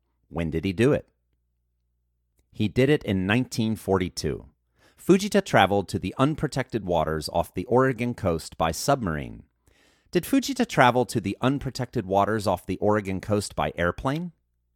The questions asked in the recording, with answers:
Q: Did Fujita travel to the unprotected waters off the Oregon coast by airplane?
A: No, Fujita didn't travel to the unprotected waters off the Oregon coast by airplane.